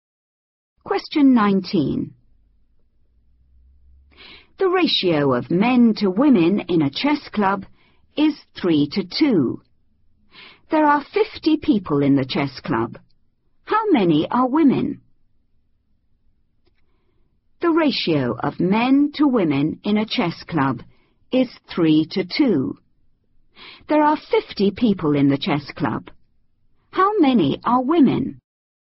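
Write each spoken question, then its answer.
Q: How many are women?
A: 20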